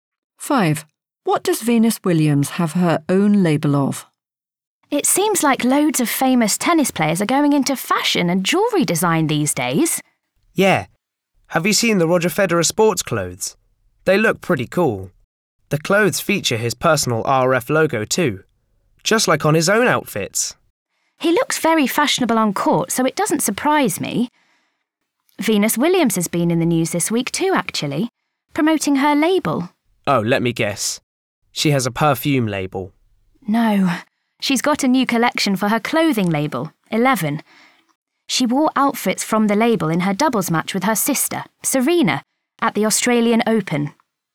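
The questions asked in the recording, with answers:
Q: What does Venus Williams have her own label of?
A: Clothing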